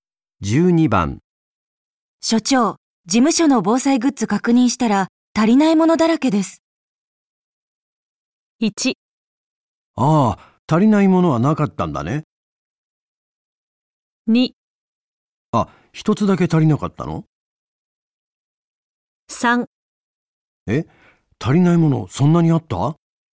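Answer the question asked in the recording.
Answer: 3: え、足りないものそんなにあった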